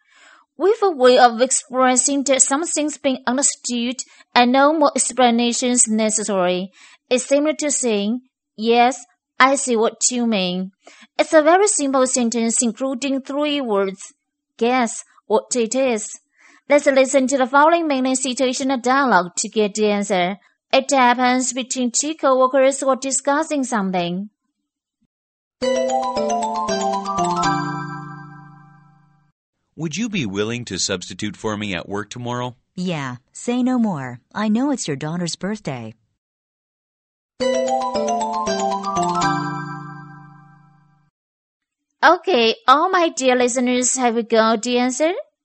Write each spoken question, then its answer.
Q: Guess what it is.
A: Say no more.